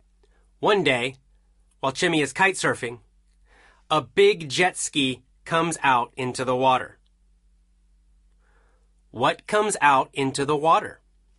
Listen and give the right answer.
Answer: A jet ski. A jet ski comes out into the water.